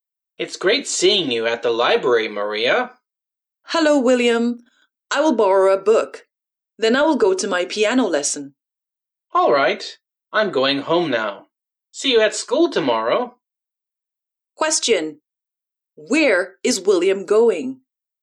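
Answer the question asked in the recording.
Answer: Home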